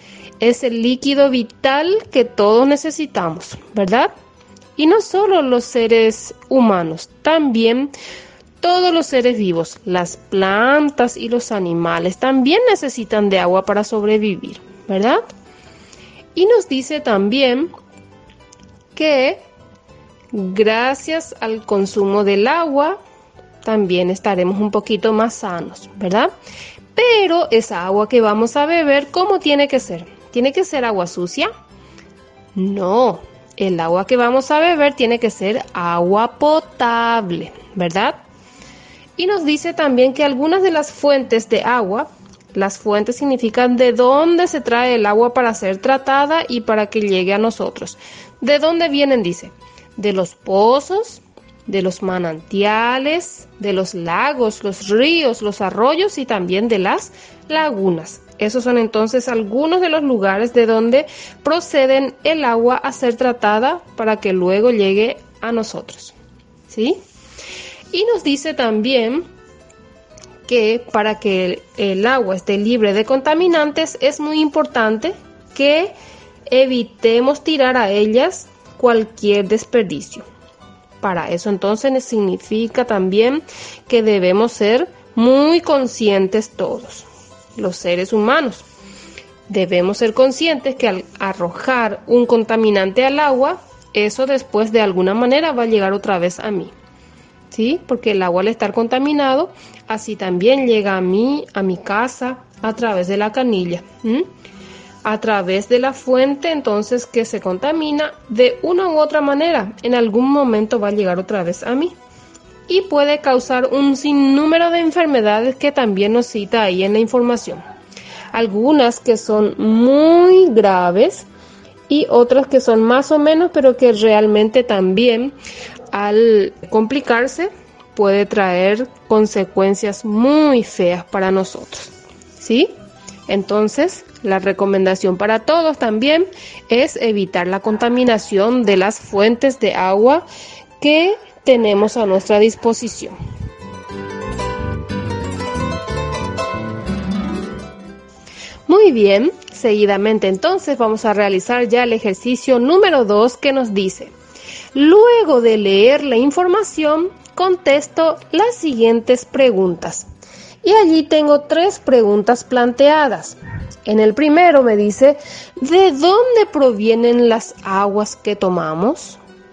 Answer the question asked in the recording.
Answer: Algunas de las fuentes son los pozos, los manantiales, los lagos, los ríos, los arroyos y las lagunas